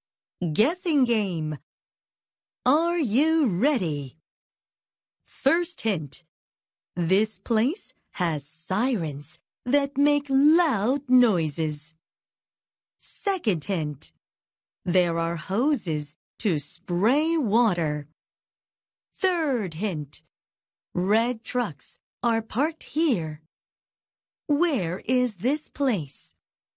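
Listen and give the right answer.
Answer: a fire station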